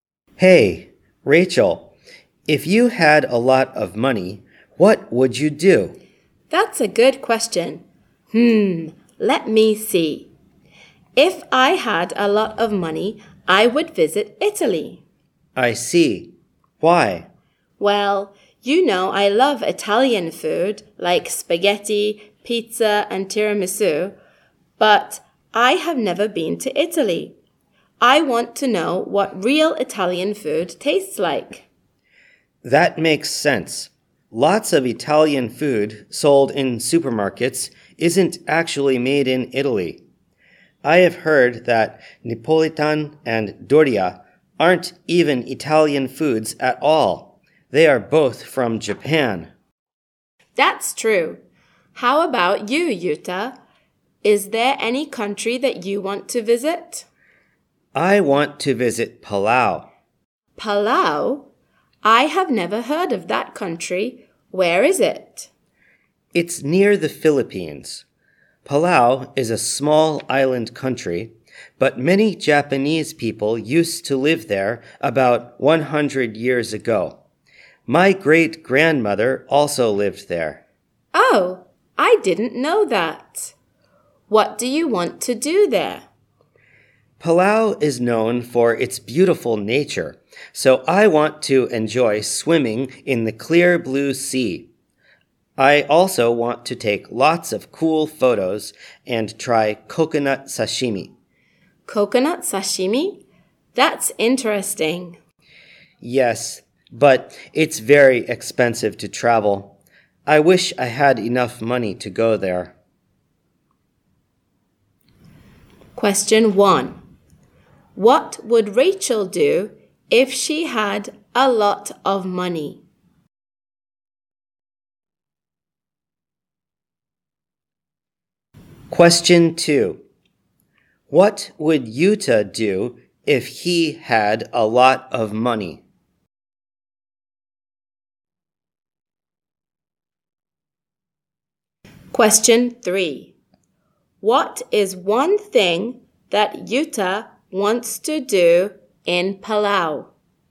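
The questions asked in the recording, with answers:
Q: What would Rachel do if she had a lot of money?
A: She would visit Italy.

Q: What would Yuta do if he had a lot of money?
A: He would visit Palau.

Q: What is one thing that Yuta wants to do in Palau?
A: Swim in the clear blue sea (or take photos, or try coconut sashimi).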